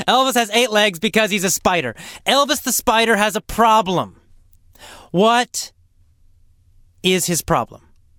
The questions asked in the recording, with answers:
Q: What is his problem?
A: Well, his problem is he can't swim.